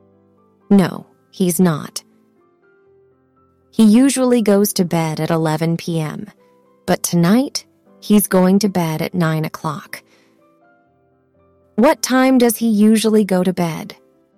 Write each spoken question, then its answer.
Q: What time does he usually go to bed?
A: 11 p.m.